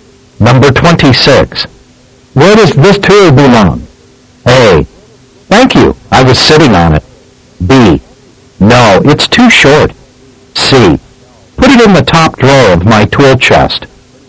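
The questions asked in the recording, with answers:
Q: Where does this tool belong?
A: C: Put it in the top drawer of my tool chest.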